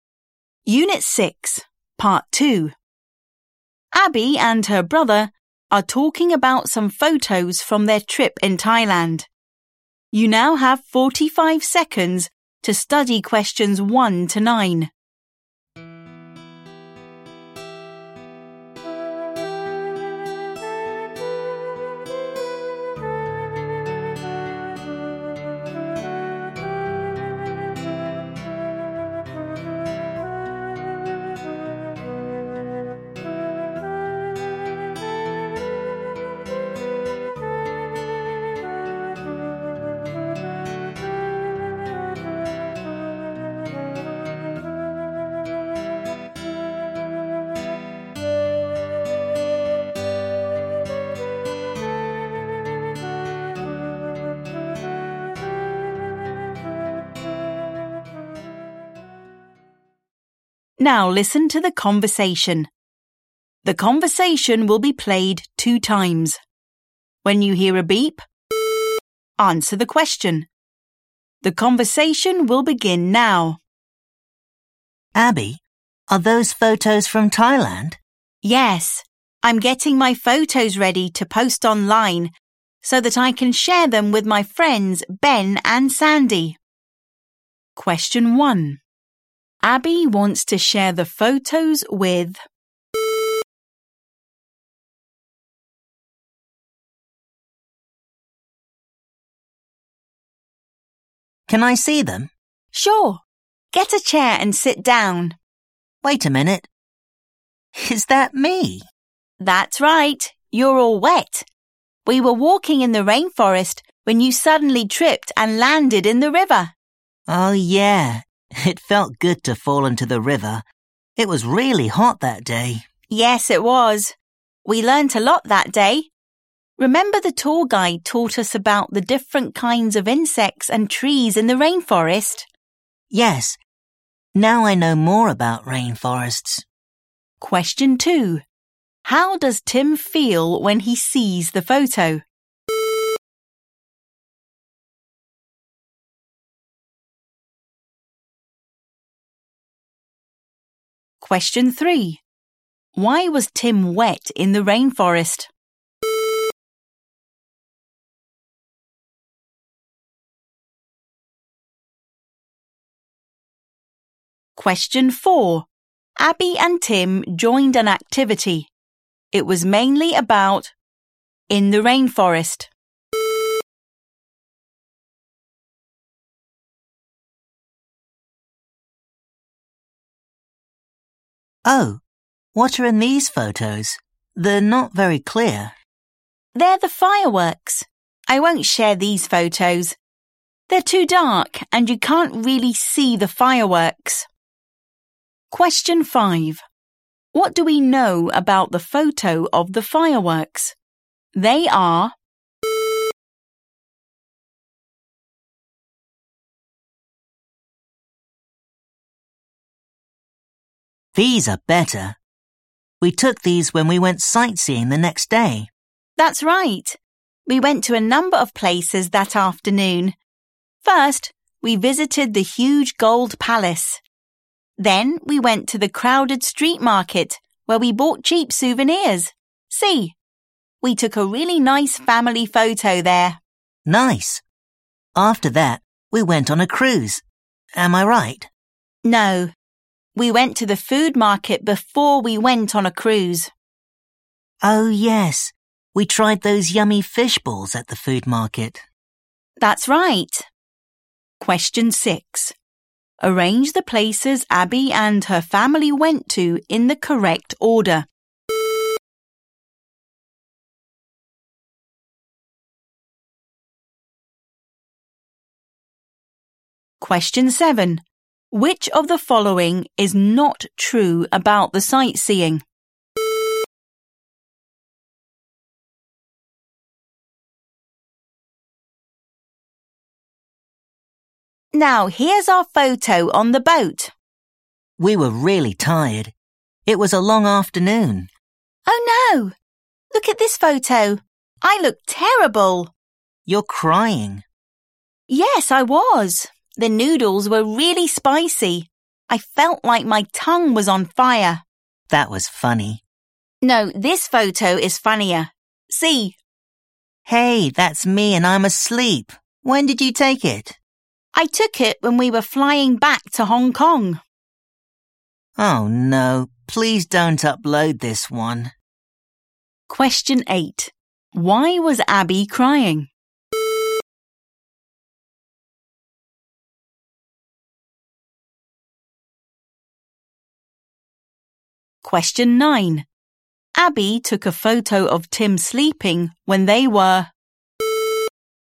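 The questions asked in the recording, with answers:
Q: Abby wants to share the photos with...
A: her friends Ben and Sandy

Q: Why was Tim wet in the rainforest?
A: He tripped and fell into the river

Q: Abby and Tim joined an activity. It was mainly about in the rainforest.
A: different kinds of insects and trees

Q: What do we know about the photo of the fireworks? They are...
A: too dark

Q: Arrange the places Abby and her family went to in the correct order.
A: gold palace, street market, food market, cruise

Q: Why was Abby crying?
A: The noodles were really spicy

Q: Abby took a photo of Tim sleeping when they were...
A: flying back to Hong Kong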